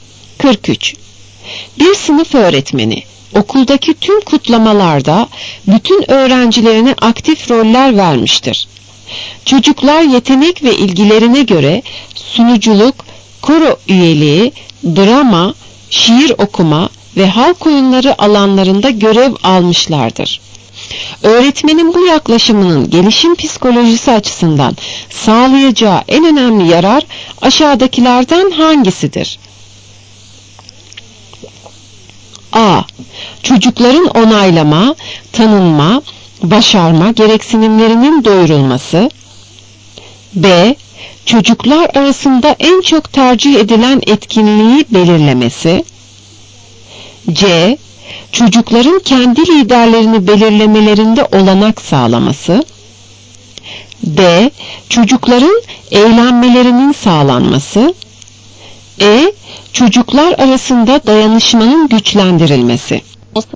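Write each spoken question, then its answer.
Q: Öğretmenin bu yaklaşımının gelişim psikolojisi açısından sağlayacağı en önemli yarar aşağıdakilerden hangisidir?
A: A: Çocukların onaylama, tanınma, başarma gereksinimlerinin doyurulması.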